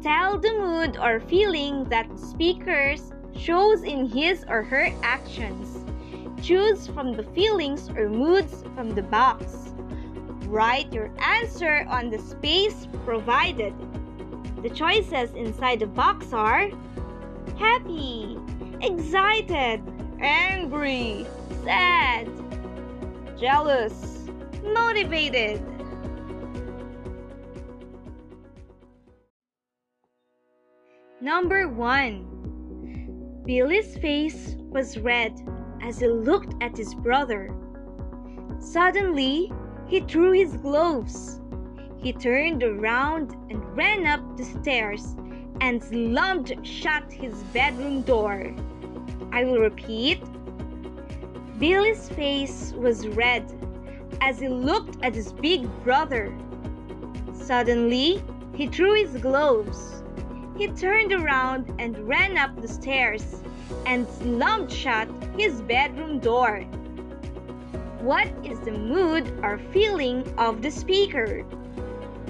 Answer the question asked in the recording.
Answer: Yes, speaker's mood or feeling is angry.